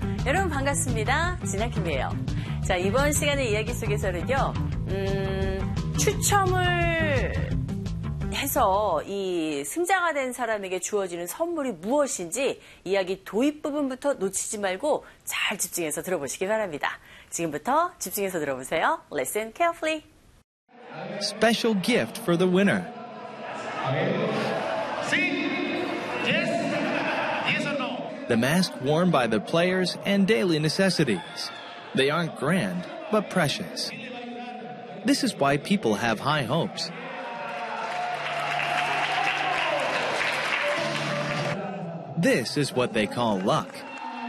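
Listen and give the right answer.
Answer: 선수들이 착용한 마스크와 생활필수품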